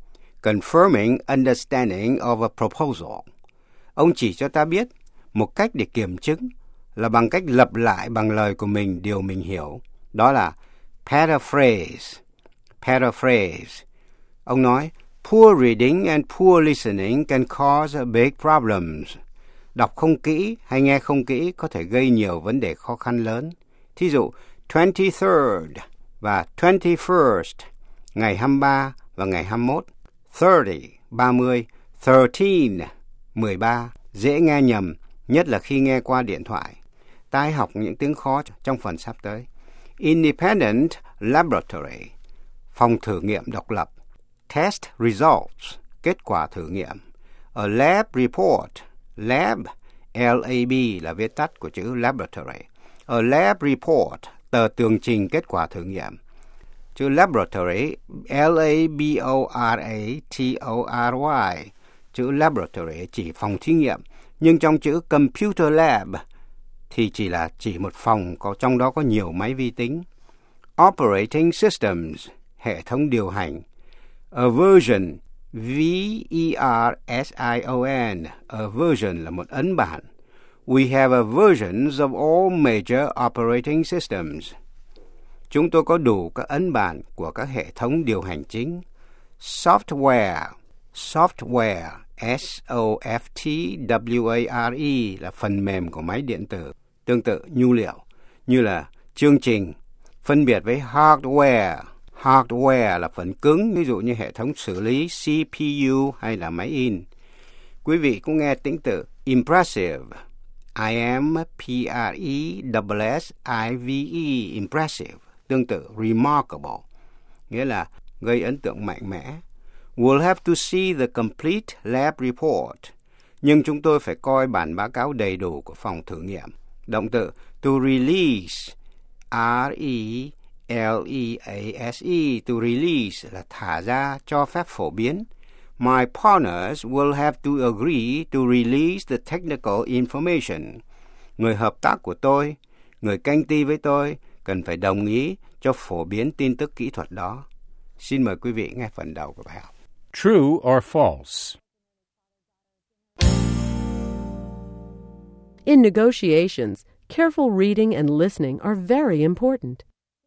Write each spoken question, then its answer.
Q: In negotiations, careful reading and listening are very important.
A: True. Poor reading or listening can cause big problems.